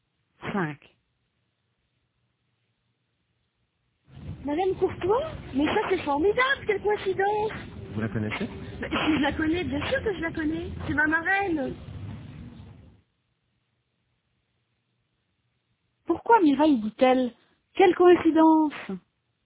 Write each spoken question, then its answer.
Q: Pourquoi Mireille dit-elle? Quelle coïncidence!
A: Parce qu'elle connaît Madame Courtois.